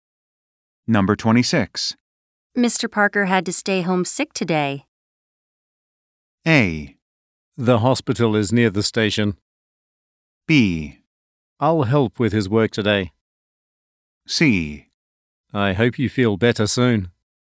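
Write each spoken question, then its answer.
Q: Mr. Parker had to stay home sick today.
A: B: I'll help with his work today.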